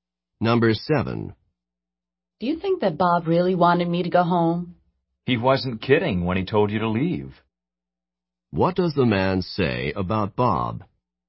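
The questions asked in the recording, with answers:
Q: What does the man say about Bob?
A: Bob was serious; he really wanted him to leave.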